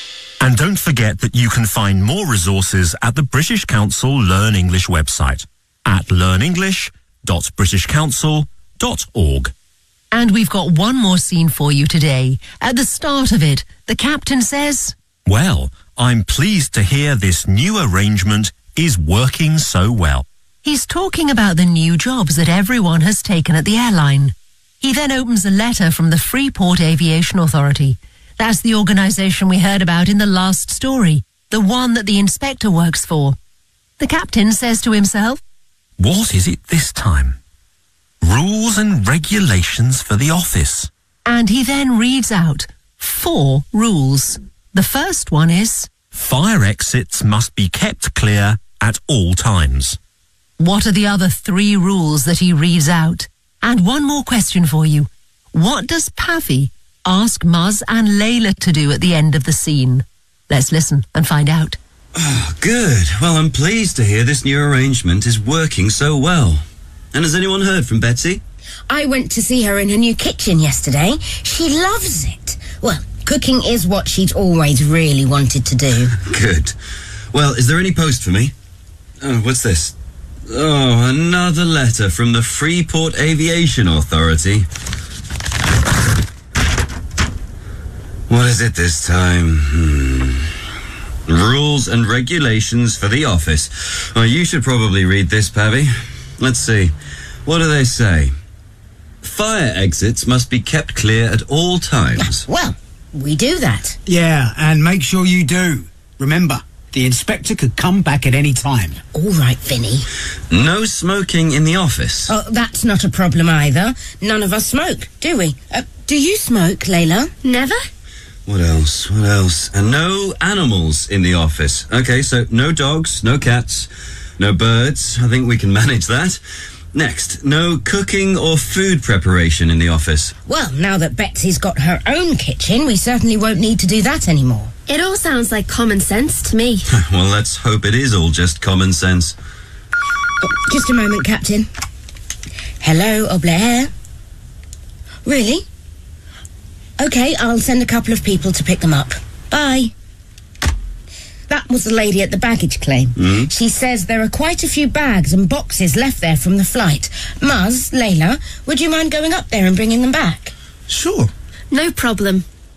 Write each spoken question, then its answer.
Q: What are the other three rules that he reads out?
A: No smoking in the office.